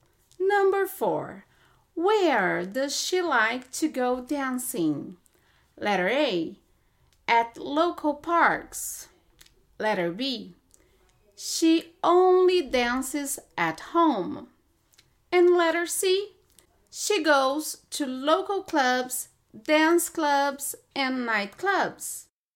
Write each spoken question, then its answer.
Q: Where does she like to go dancing?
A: Letter C is correct. She goes to local clubs, dance clubs, and nightclubs.